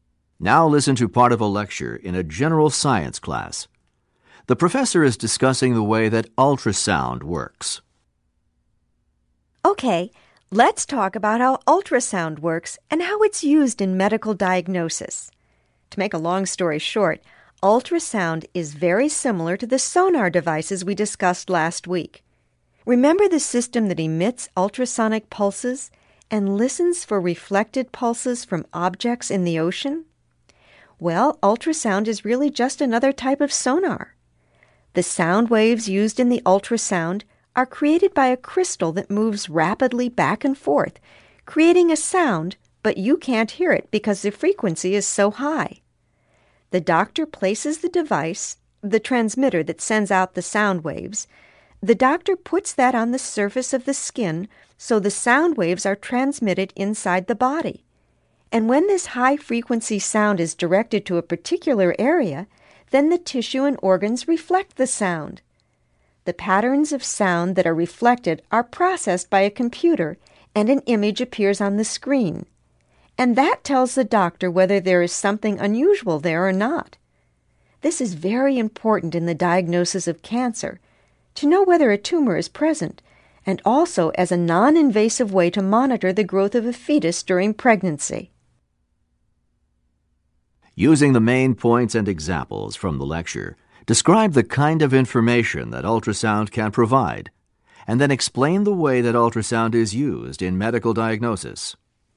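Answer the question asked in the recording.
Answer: Ultrasound shows images of tissue and organs inside the body, like sonar. A transmitter on the skin sends high-frequency sound waves, and the tissue and organs reflect them. A computer turns the reflected patterns into an image that shows doctors if something is unusual. It is used to detect tumors when diagnosing cancer and to monitor a fetus's growth without surgery.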